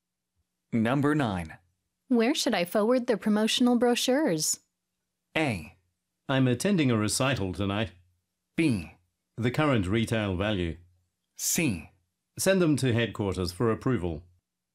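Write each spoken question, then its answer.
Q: Where should I forward the promotional brochures?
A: C: Send them to headquarters for approval.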